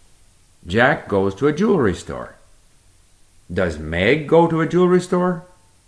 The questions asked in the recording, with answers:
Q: Does Meg go to a jewelry store?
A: No, Meg doesn't go to a jewelry store, but Jack does.